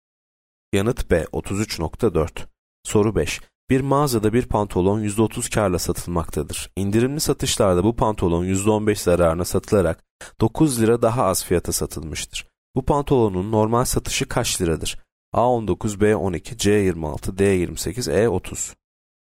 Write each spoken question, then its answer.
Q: Bu pantolonun normal satışı kaç liradır?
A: C 26.